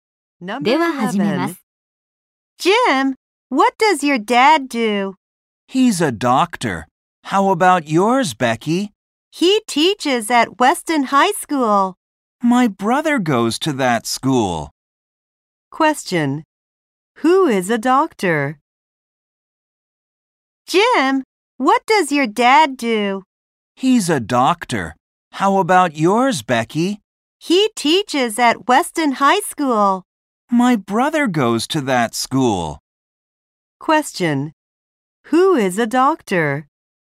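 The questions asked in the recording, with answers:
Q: Who is a doctor?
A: Jim's father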